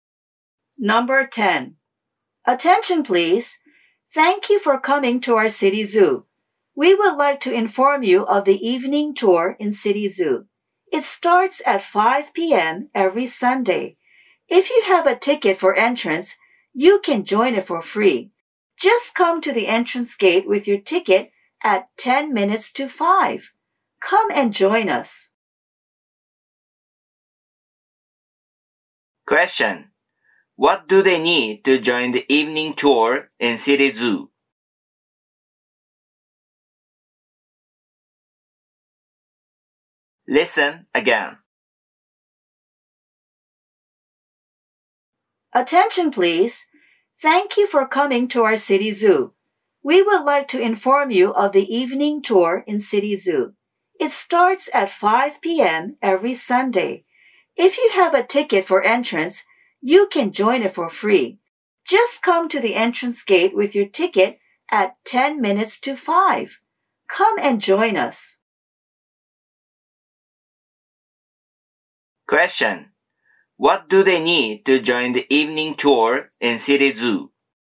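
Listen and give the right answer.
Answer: An entrance ticket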